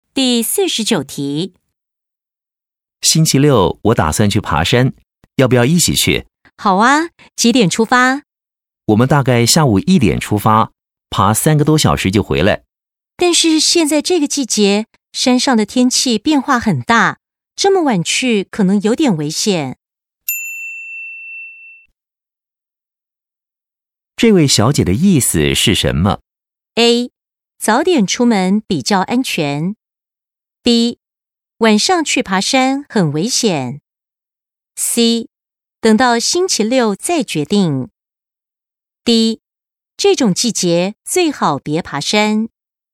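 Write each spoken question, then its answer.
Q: 这位小姐的意思是什么?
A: A: 早点出门比较安全。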